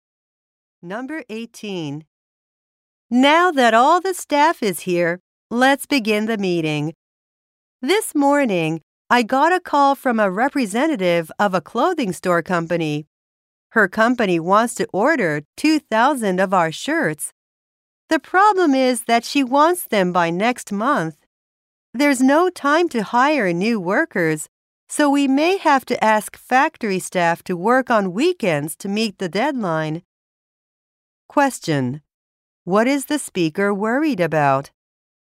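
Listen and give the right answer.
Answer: Making 2,000 shirts by next month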